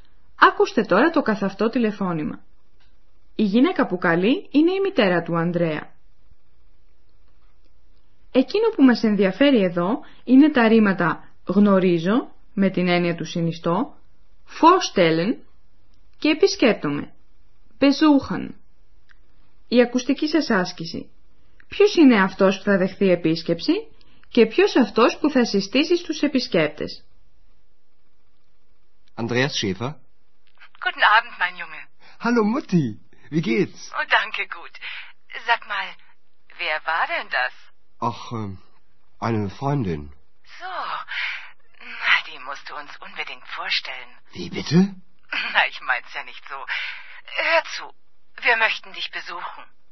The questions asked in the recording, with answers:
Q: Ποιος είναι αυτός που θα δεχθεί επίσκεψη και ποιος αυτός που θα συστήσει στους επισκέπτες?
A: Η μητέρα του Ανδρέα θέλει να τον επισκεφθεί και να τις γνωρίσει ο Ανδρέας την Εξ.